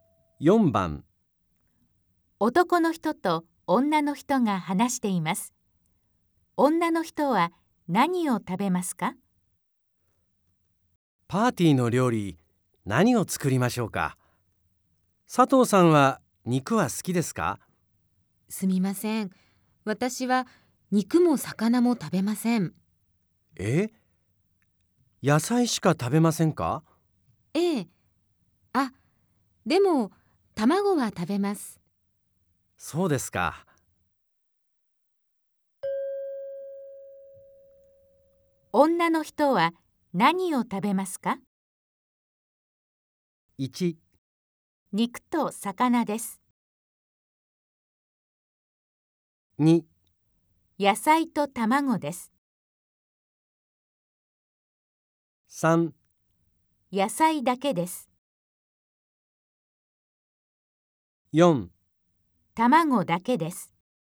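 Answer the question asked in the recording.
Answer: 2: 野菜と卵です。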